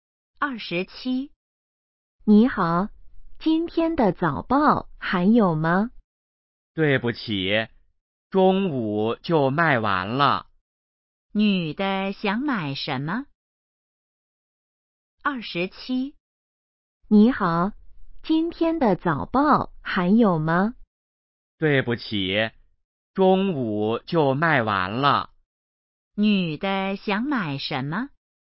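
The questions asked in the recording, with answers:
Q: 女的想买什么?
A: 今天的早报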